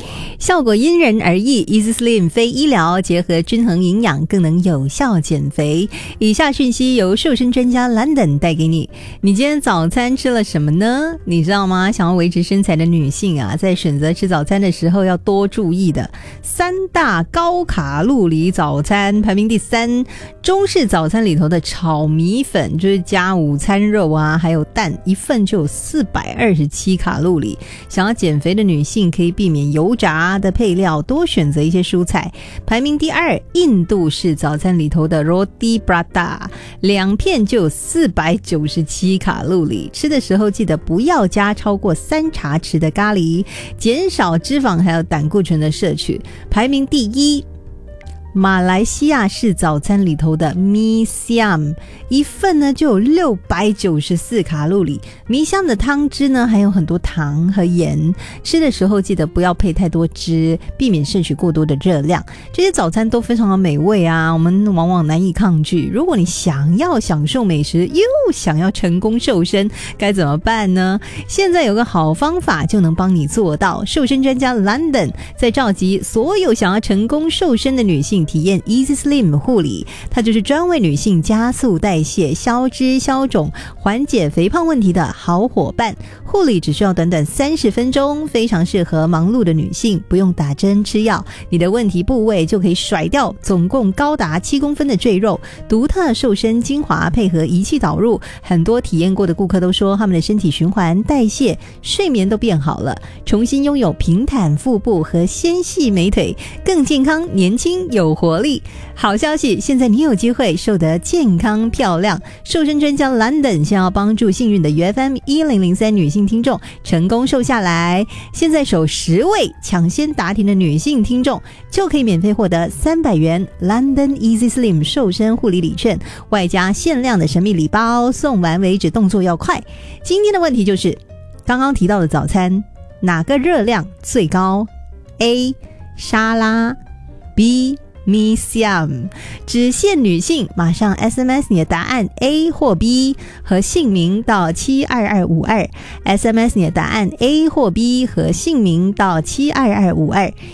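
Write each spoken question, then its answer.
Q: 今天的问题就是刚刚提到的早餐哪个热量最高? A 沙拉,B Mi Siam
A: B: Mi Siam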